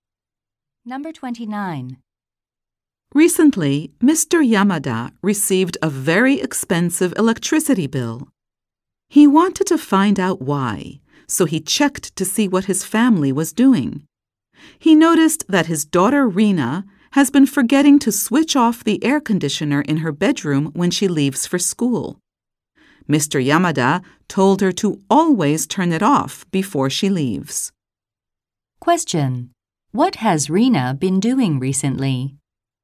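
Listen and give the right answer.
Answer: Forgetting to turn off her air conditioner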